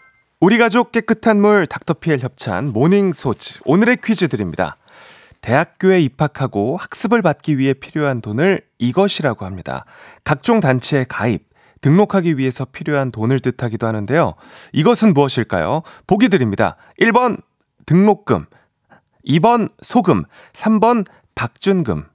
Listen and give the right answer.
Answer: 7035님 1번 등록금 정답입니다.